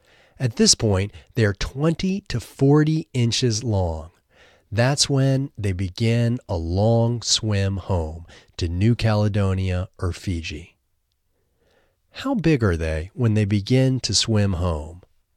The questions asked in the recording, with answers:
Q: How big are they when they begin to swim home?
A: They are 20 to 40 inches when they begin to swim home.